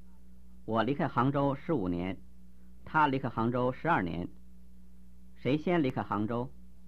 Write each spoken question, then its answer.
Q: 谁先离开杭州?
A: 我先离开杭州。